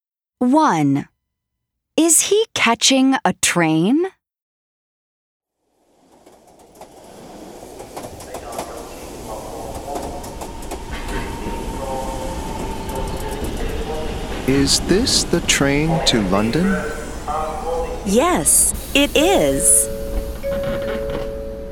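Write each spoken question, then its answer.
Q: Is he catching a train?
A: Yes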